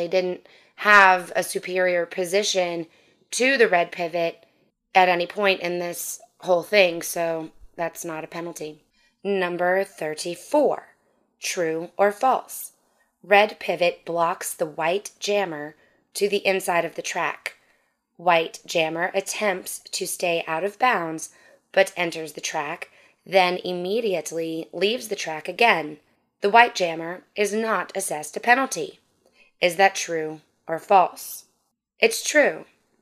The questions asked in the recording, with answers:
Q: The White Jammer is not assessed a penalty.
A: It's true.